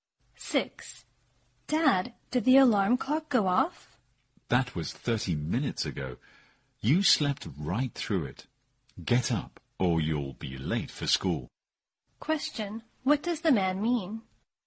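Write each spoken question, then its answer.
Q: What does the man mean?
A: The alarm went off 30 minutes ago and the child slept through it.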